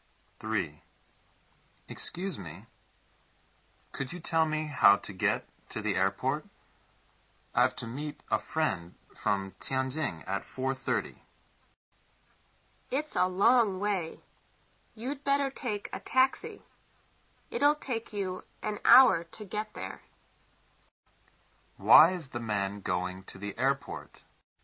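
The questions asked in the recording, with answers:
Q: Why is the man going to the airport?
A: To meet a friend from Tianjin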